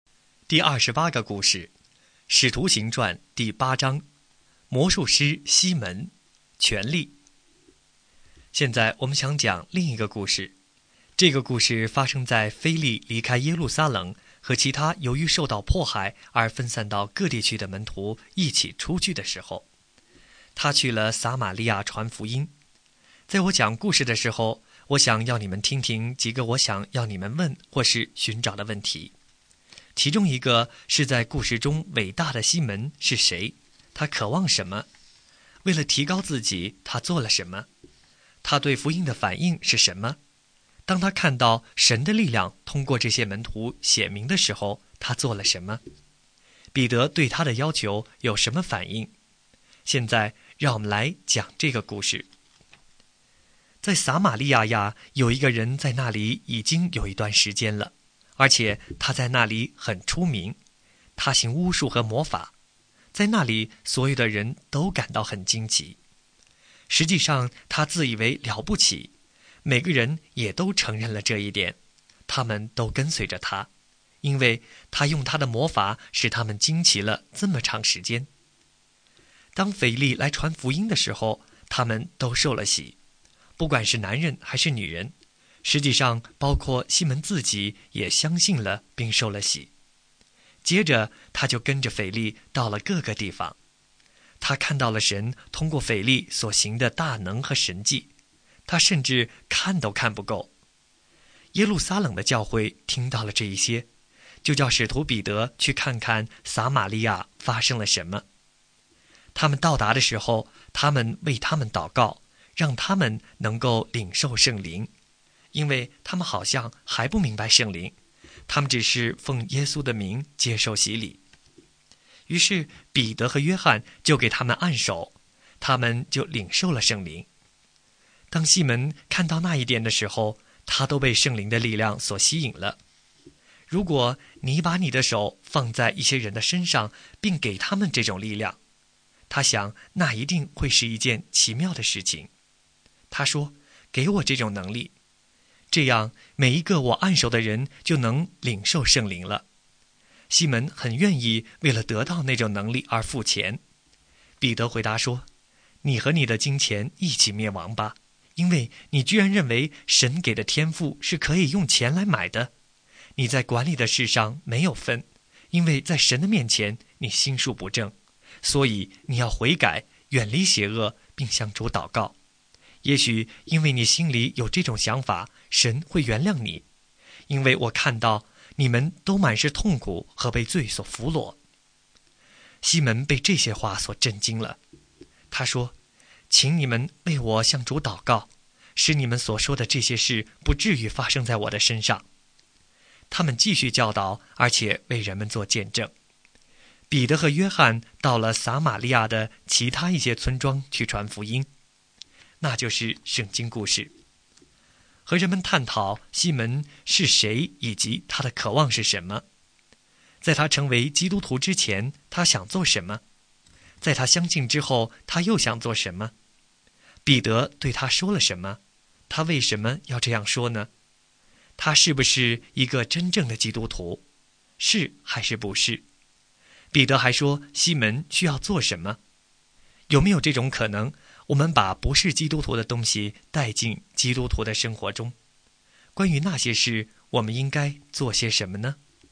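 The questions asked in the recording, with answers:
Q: 在他相信之后,他又想做什么?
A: 想花钱买按手使人领受圣灵的能力

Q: 彼得对他说了什么?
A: 你和你的金钱一起灭亡吧,因为你居然认为神给的天赋可以用钱买

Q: 彼得还说西门需要做什么?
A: 悔改,远离邪恶,并向主祷告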